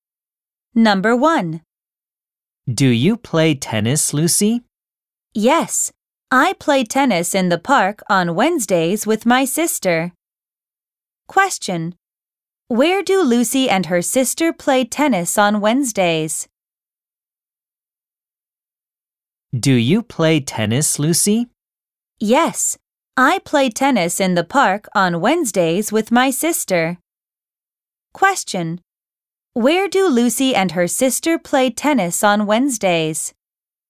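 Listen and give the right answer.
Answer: In the park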